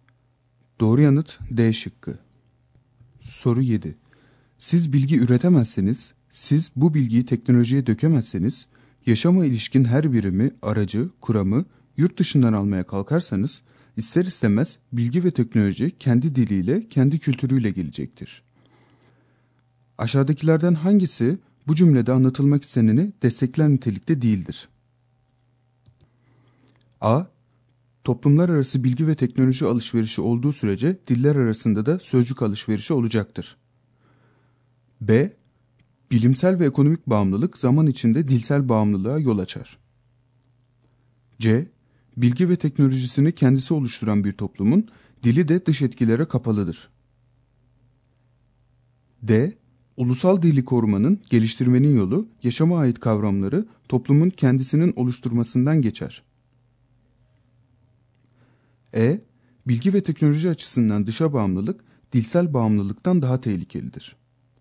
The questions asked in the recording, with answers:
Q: Aşağıdakilerden hangisi bu cümlede anlatılmak isteneni destekler nitelikte değildir?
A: Doğru yanıt E şıkkı.